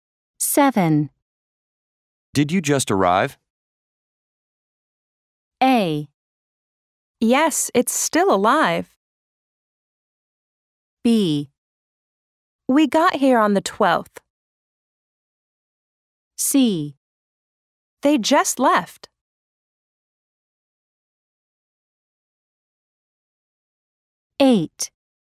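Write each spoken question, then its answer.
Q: Did you just arrive?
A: B: We got here on the 12th.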